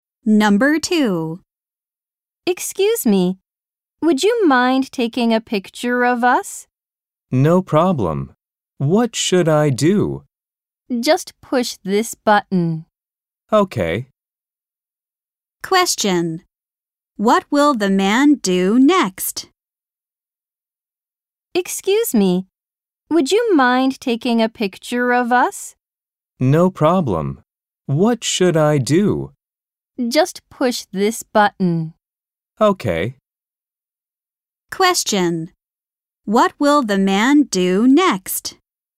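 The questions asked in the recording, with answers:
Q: What will the man do next?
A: Take a picture of them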